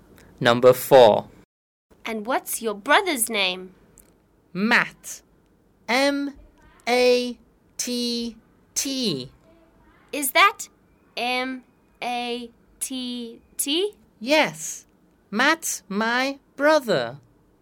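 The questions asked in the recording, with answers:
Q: And what's your brother's name?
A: Matt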